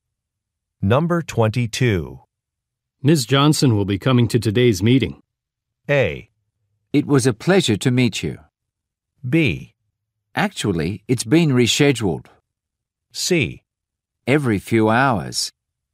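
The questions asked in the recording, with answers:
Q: Ms. Johnson will be coming to today's meeting.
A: B: Actually, it's been rescheduled.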